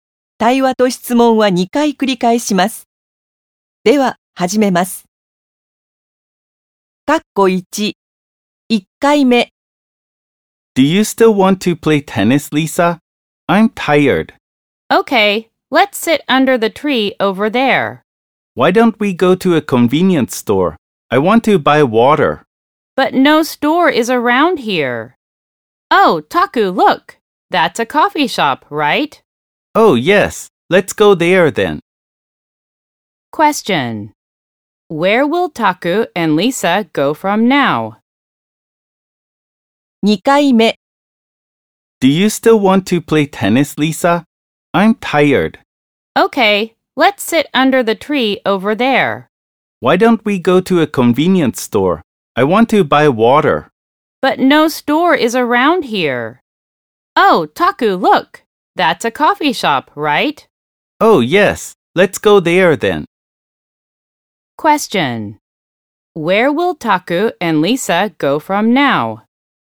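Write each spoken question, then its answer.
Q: Where will Taku and Lisa go from now?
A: To a coffee shop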